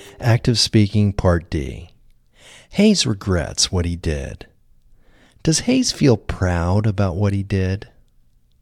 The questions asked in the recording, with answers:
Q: Does Hayes feel proud about what he did?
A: No, Hayes doesn't feel proud about what he did.